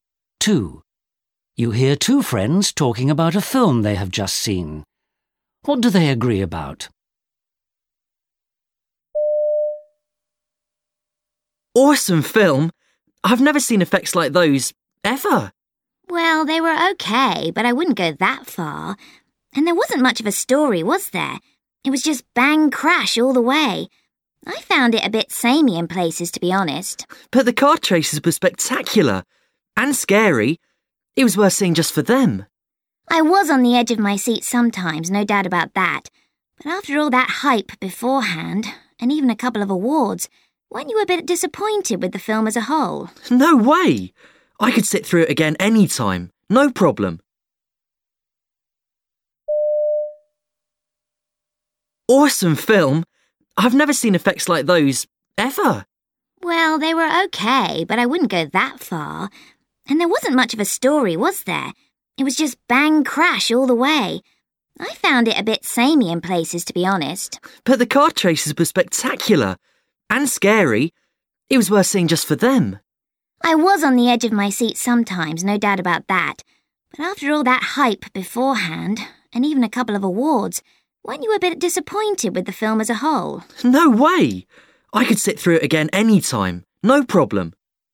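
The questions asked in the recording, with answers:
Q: What do they agree about?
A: The car chases were exciting.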